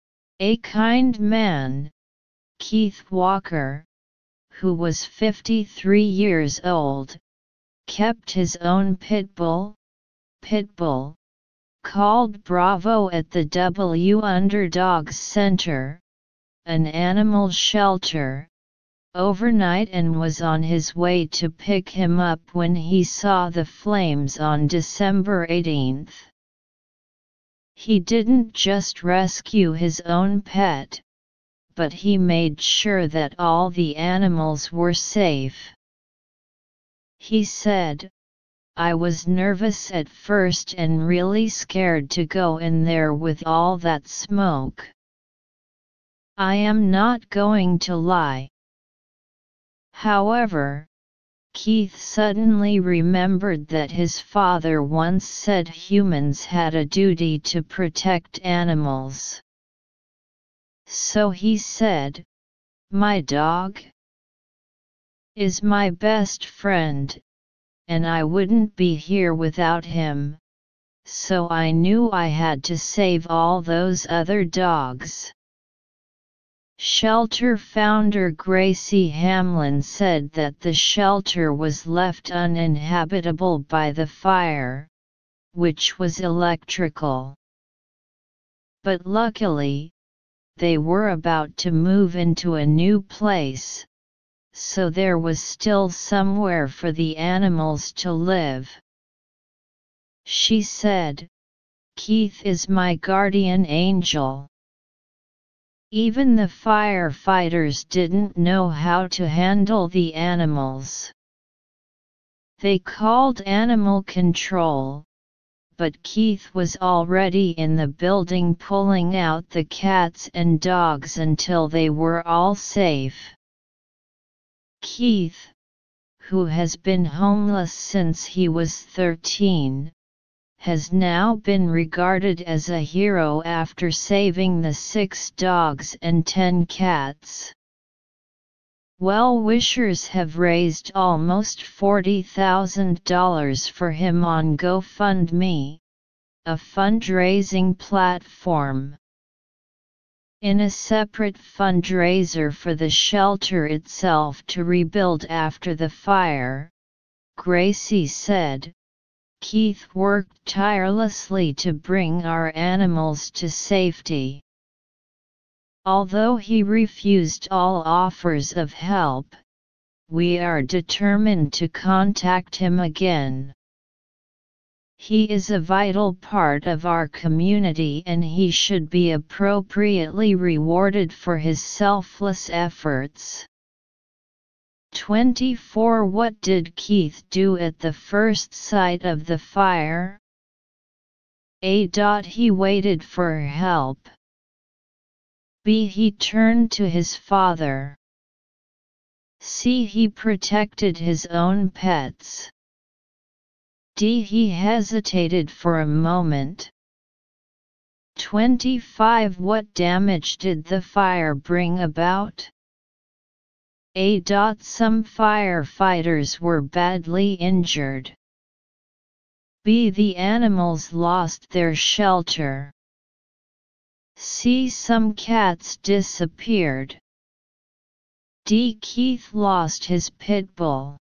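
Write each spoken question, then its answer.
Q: What did Keith do at the first sight of the fire?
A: D: He hesitated for a moment.

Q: What damage did the fire bring about?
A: B: The animals lost their shelter.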